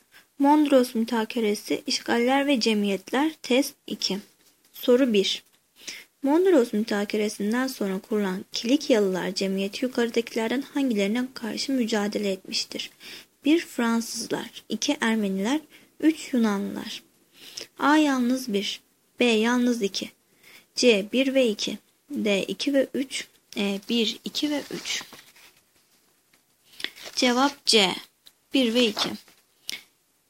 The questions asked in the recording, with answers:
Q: Mondros Mütakeresinden sonra kurulan Kilikyalılar Cemiyeti yukarıdakilerden hangilerine karşı mücadele etmiştir?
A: Cevap C. 1 ve 2.